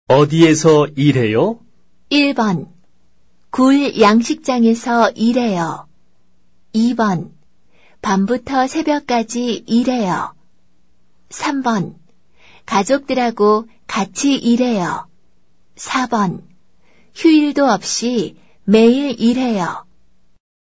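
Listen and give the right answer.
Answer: 1: 굴 양식장에서 일해요.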